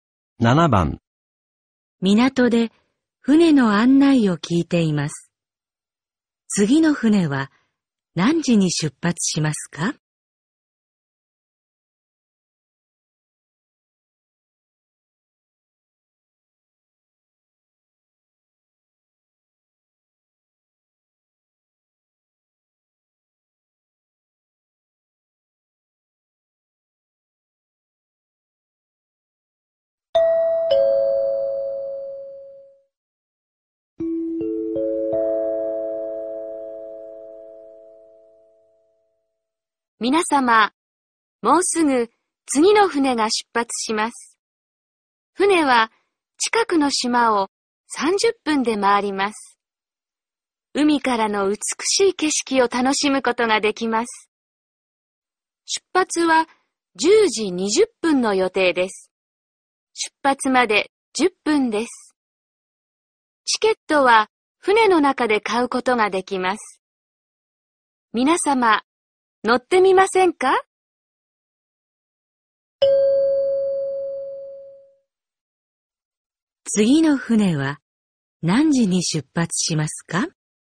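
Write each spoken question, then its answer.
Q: 次の船は何時に出発しますか?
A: 10時20分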